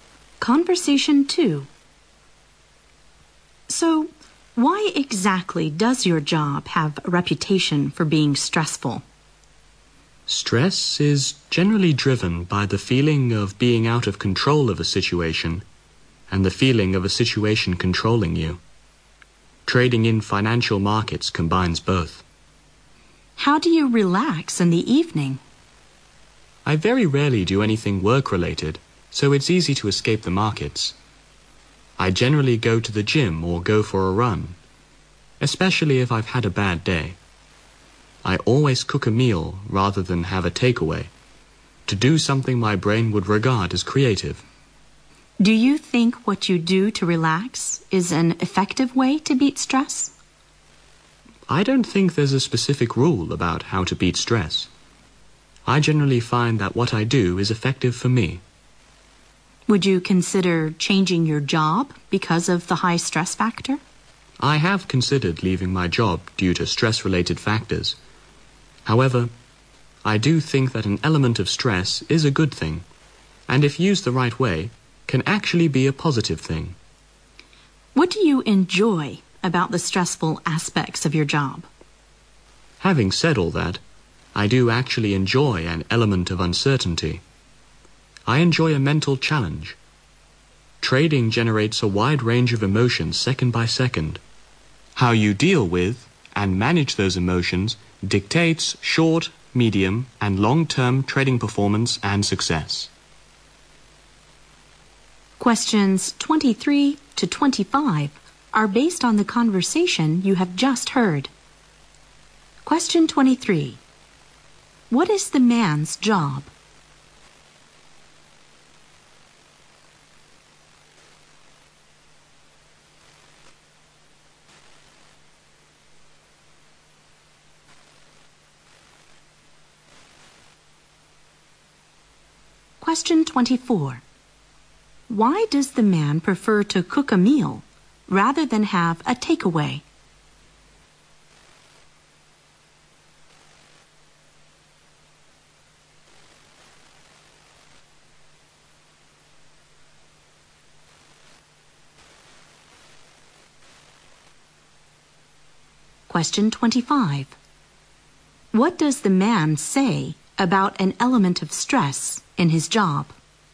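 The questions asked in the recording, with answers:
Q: What is the man's job?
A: Trading in financial markets

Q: Why does the man prefer to cook a meal rather than have a takeaway?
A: To do something creative

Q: What does the man say about an element of stress in his job?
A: It can be a good, positive thing if used the right way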